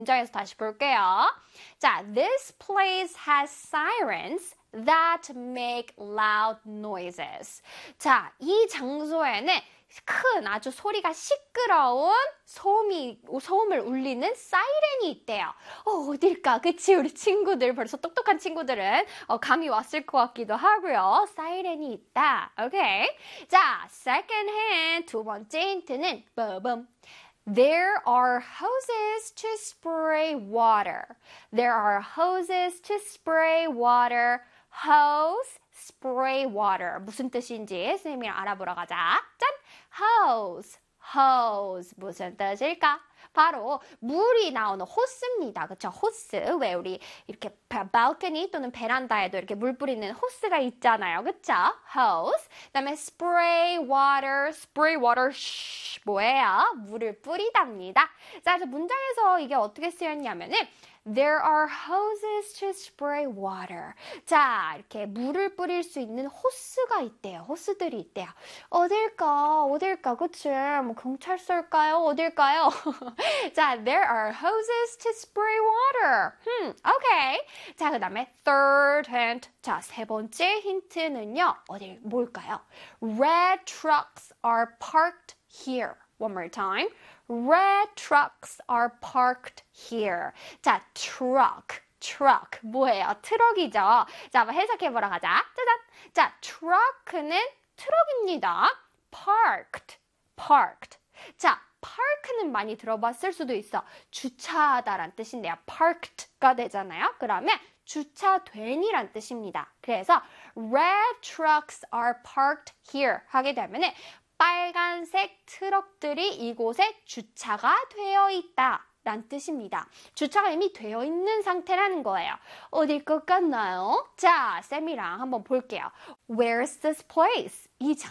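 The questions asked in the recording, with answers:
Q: Where's this place?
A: a fire station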